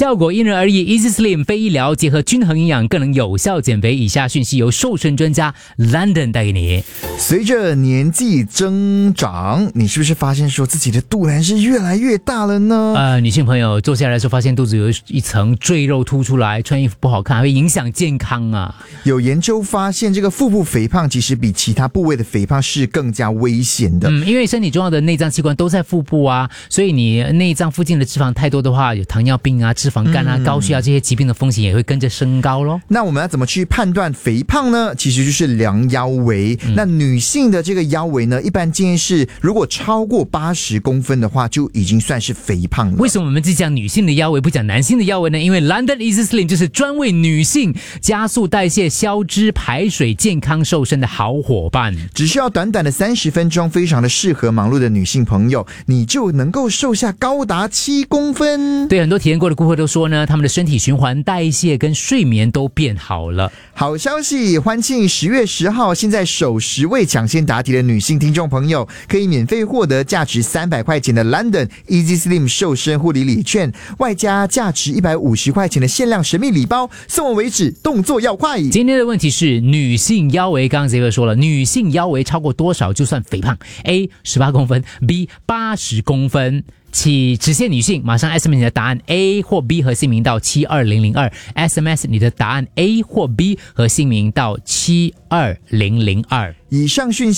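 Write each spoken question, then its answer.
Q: 今天的问题是女性腰围,刚刚杰哥说了,女性腰围超过多少就算肥胖?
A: B: 80公分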